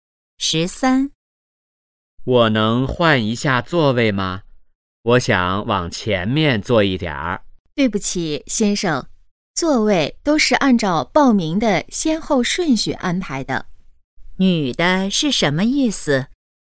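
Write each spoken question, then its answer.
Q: 女的是什么意思?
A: 不能换座位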